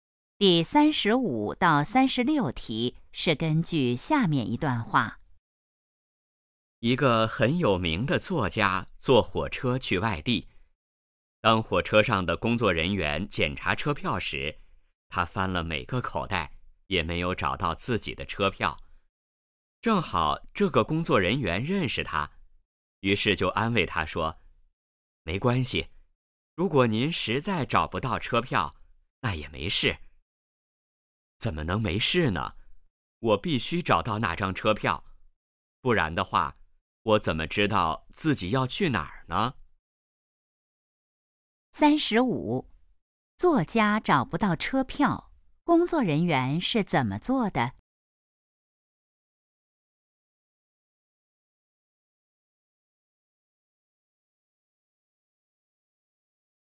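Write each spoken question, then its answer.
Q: 作家找不到车票,工作人员是怎么做的?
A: 安慰他说没关系

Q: 作家为什么一定要找车票?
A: 不知道自己要去哪儿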